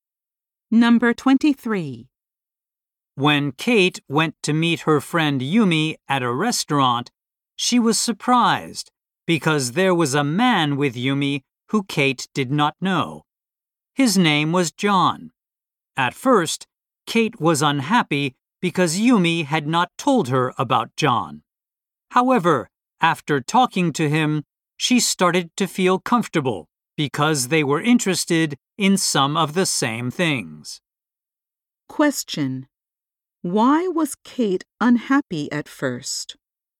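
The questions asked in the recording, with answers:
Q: Why was Kate unhappy at first?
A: Yumi had not told her about John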